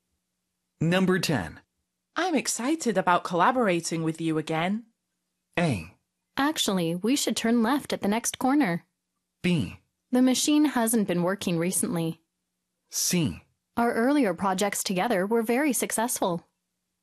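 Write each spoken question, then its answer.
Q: I'm excited about collaborating with you again.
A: C: Our earlier projects together were very successful.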